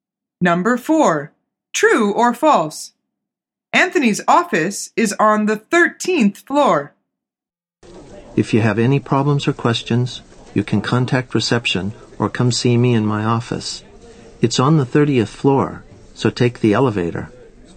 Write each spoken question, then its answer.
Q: Anthony's office is on the 13th floor.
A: The answer is false. He says, it's on the 30th floor, so take the elevator.